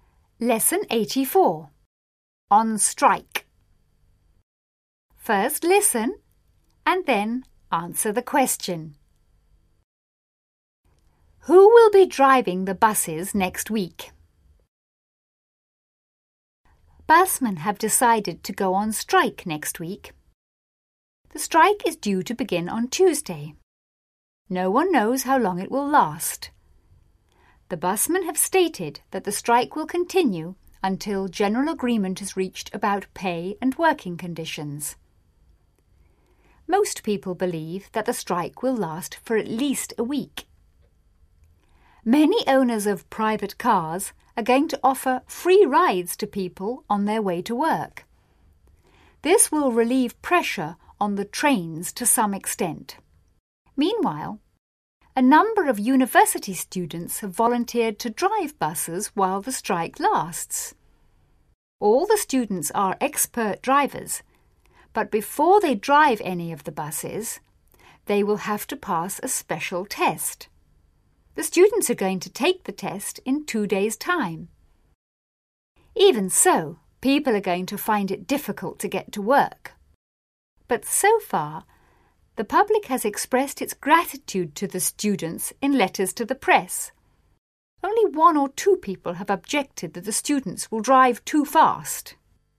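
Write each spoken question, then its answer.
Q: Who will be driving the buses next week?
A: University students who have volunteered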